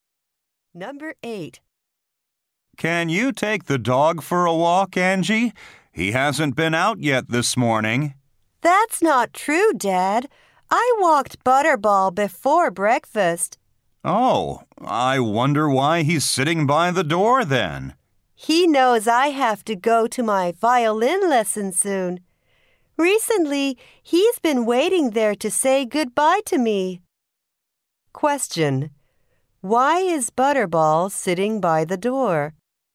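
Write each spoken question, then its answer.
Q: Why is Butterball sitting by the door?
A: He's waiting to say goodbye to Angie before her violin lesson.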